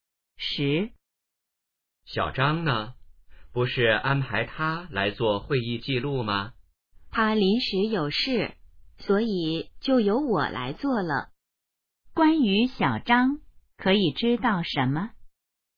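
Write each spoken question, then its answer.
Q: 关于小张,可以知道什么?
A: 他临时有事,没来做会议记录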